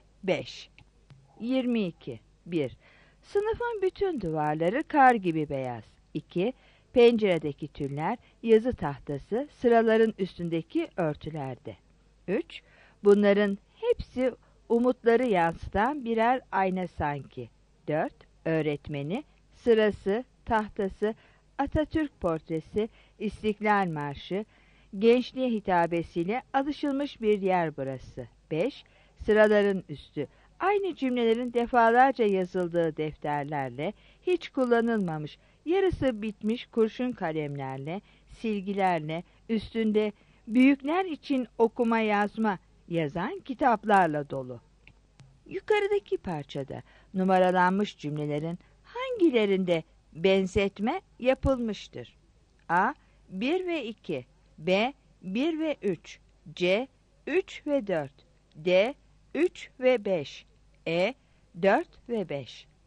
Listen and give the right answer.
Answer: 22 B